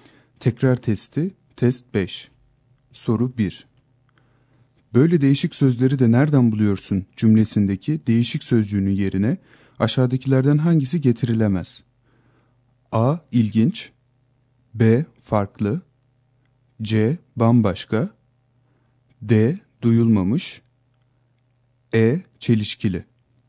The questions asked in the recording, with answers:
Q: Böyle değişik sözleri de nereden buluyorsun cümlesindeki değişik sözcüğünün yerine aşağıdakilerden hangisi getirilemez?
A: Doğru yanıt E şıkkı.